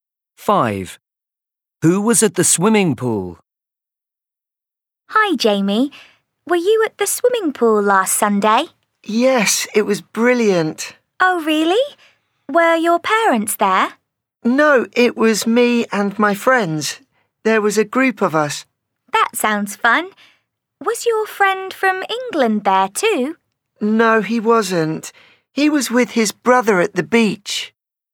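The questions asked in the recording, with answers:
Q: Who was at the swimming pool?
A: Jamie and his friends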